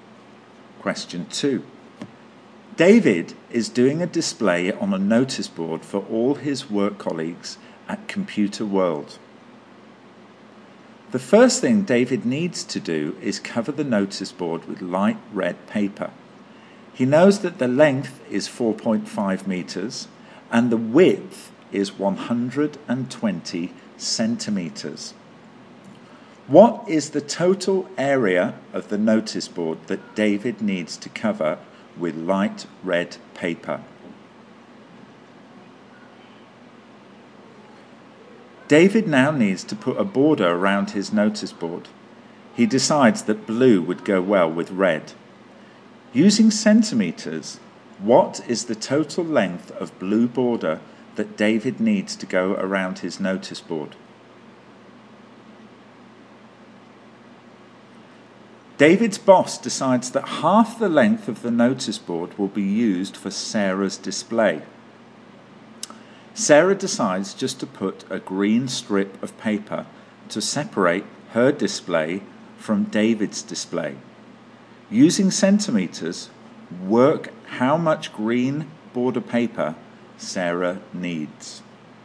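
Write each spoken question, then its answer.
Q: What is the total area of the notice board that David needs to cover with light red paper?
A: 5.4 square metres

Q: Using centimetres, what is the total length of blue border that David needs to go around his notice board?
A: 1140 centimetres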